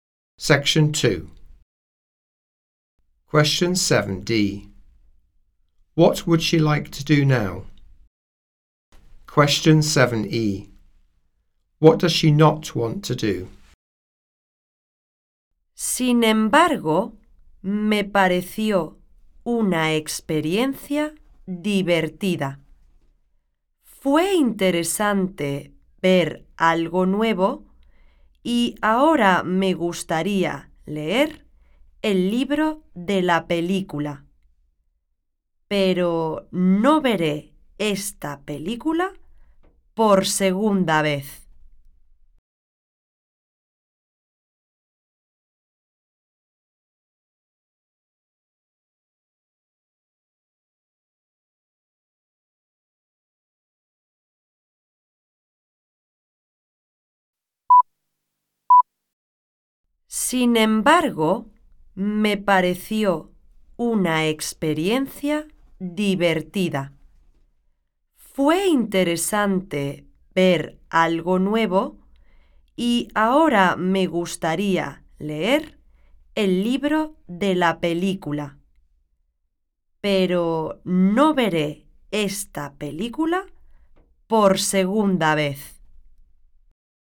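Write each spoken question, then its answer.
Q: What would she like to do now?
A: Read the book of the film

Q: What does she not want to do?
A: Watch the film a second time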